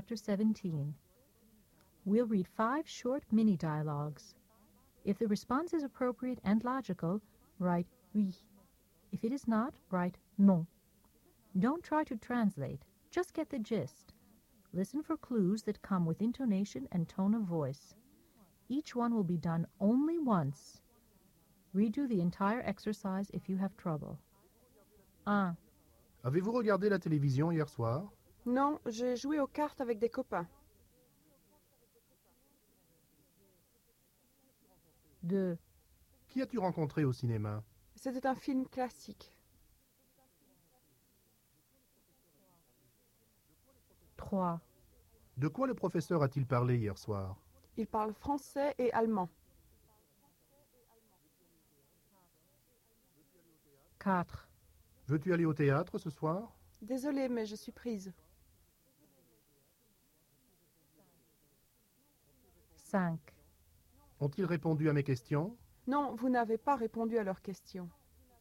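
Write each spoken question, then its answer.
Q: Avez-vous regardé la télévision hier soir?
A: oui

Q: Qui as-tu rencontré au cinéma?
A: non

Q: De quoi le professeur a-t-il parlé hier soir?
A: non

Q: Veux-tu aller au théâtre ce soir?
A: oui

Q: Ont-ils répondu à mes questions?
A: non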